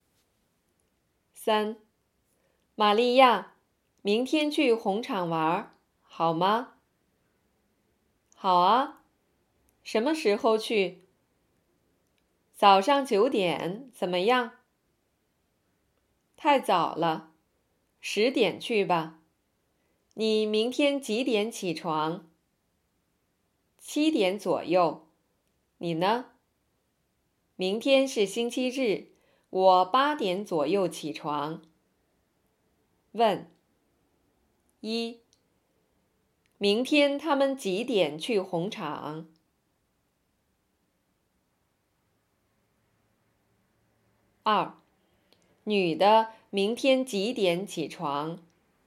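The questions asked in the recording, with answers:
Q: 明天他们几点去红场?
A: 10点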